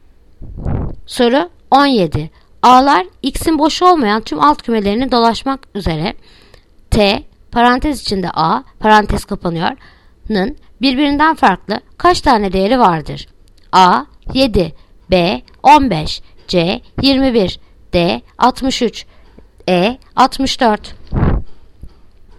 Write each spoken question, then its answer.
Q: A'lar x'in boş olmayan tüm alt kümelerini dolaşmak üzere t parantez içinde a parantez kapanıyor'nın birbirinden farklı kaç tane değeri vardır?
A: Yanıt Ceyhan. 21.